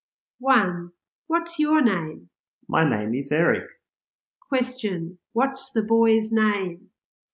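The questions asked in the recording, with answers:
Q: What's the boy's name?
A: Eric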